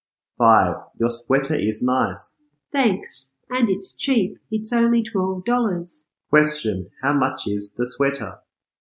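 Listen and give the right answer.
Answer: $12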